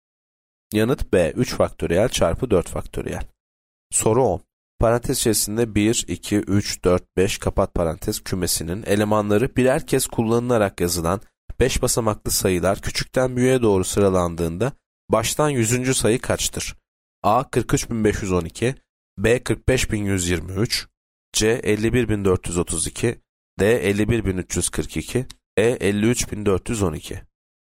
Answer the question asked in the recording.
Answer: Yanıt D 51.342.